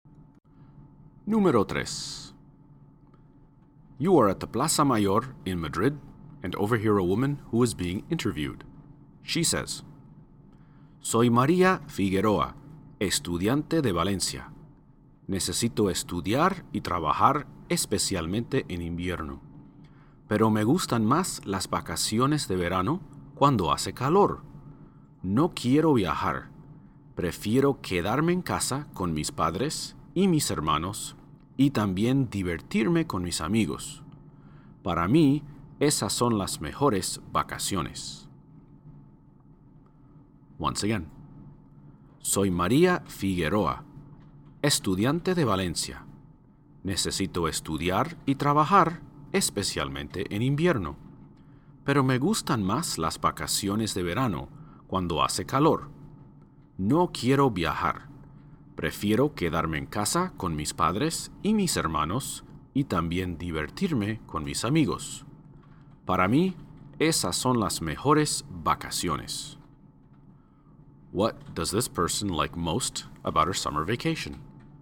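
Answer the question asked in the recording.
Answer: Staying home with her family and having fun with her friends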